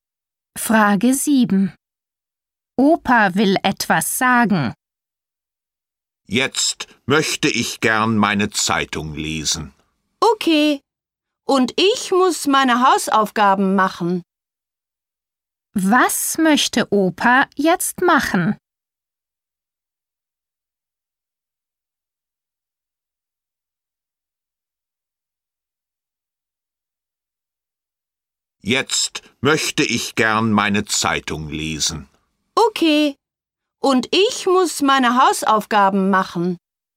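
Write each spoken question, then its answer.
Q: Was möchte Opa jetzt machen?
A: Seine Zeitung lesen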